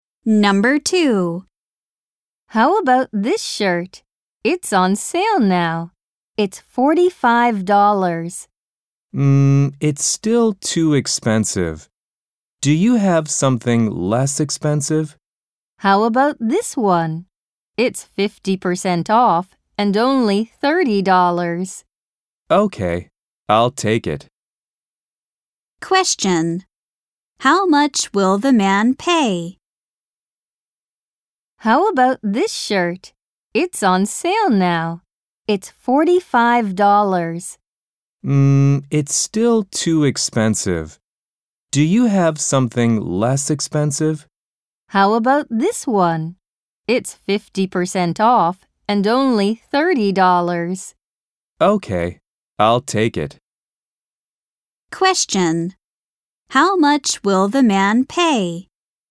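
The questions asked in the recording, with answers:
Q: How much will the man pay?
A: $30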